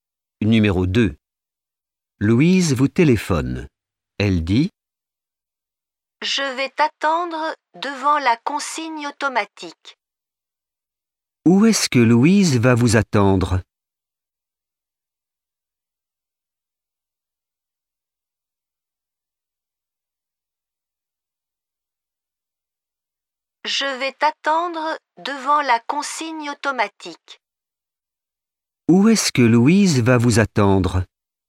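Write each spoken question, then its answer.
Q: Où est-ce que Louise va vous attendre ?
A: Devant la consigne automatique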